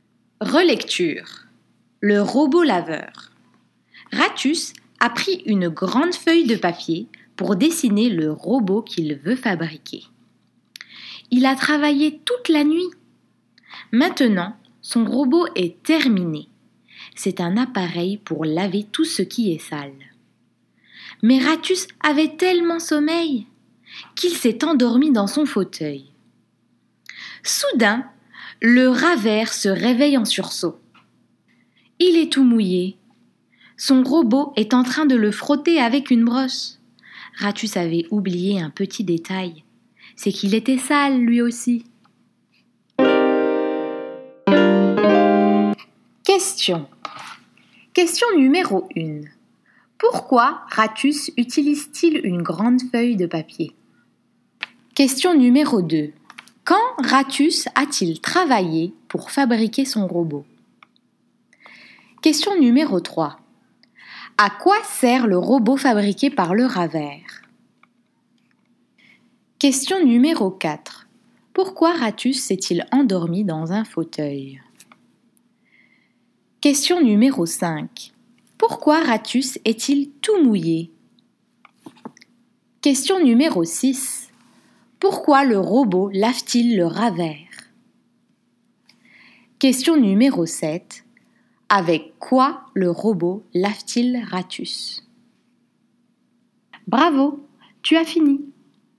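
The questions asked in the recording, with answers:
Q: Pourquoi Ratus utilise-t-il une grande feuille de papier?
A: Pour dessiner le robot qu'il veut fabriquer

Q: Quand Ratus a-t-il travaillé pour fabriquer son robot?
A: Toute la nuit

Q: À quoi sert le robot fabriqué par le rat vert?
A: À laver tout ce qui est sale

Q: Pourquoi Ratus s'est-il endormi dans un fauteuil?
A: Parce qu'il avait tellement sommeil

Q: Pourquoi Ratus est-il tout mouillé?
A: Son robot le frotte avec une brosse

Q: Pourquoi le robot lave-t-il le rat vert?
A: Parce que Ratus était sale, lui aussi

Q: Avec quoi le robot lave-t-il Ratus?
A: Avec une brosse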